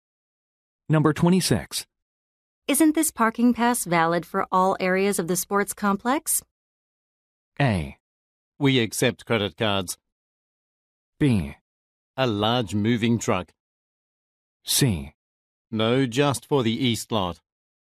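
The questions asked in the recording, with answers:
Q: Isn't this parking pass valid for all areas of the sports complex?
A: C: No, just for the east lot.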